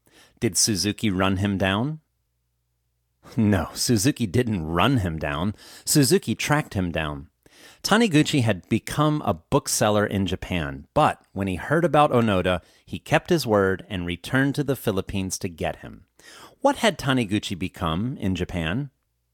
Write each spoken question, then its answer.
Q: What had Taniguchi become in Japan?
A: Taniguchi had become a bookseller in Japan.